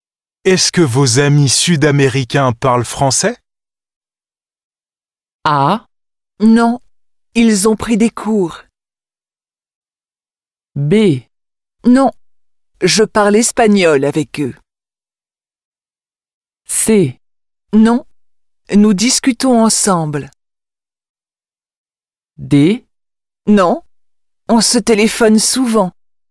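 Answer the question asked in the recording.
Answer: B: Non, je parle espagnol avec eux.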